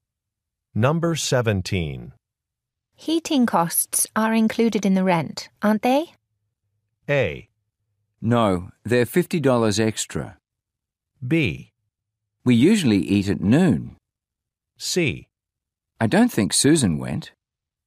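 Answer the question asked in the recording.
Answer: A: No, they're $50 extra.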